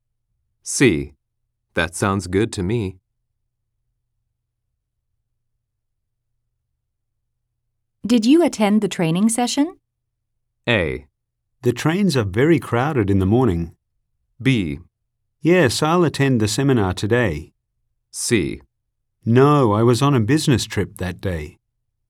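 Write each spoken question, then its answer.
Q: Did you attend the training session?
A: C: No, I was on a business trip that day.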